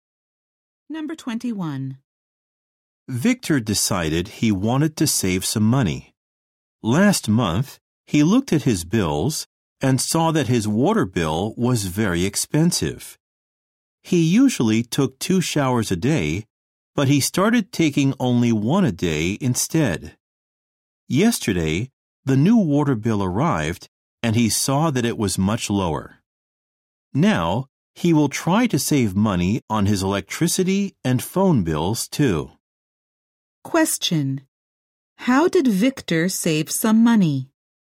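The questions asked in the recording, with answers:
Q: How did Victor save some money?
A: He took fewer showers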